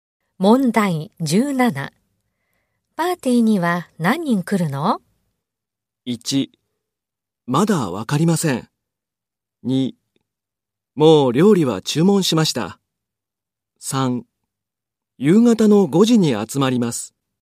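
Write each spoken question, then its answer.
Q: パーティーには何人来るの?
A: 3: まだわかりません。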